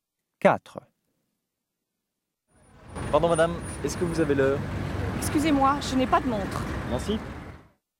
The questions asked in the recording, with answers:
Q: Pardon, madame, est-ce que vous avez l'heure?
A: And 4, non.